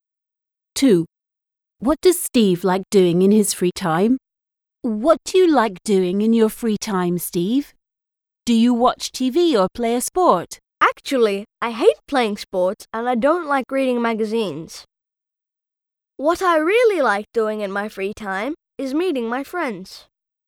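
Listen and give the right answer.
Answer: Meeting his friends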